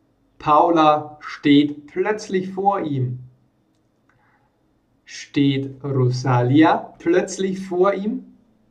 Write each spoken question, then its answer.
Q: Steht Rosalia plötzlich vor ihm?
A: Nein, nicht Rosalia steht plötzlich vor ihm, sondern seine Freundin Paula.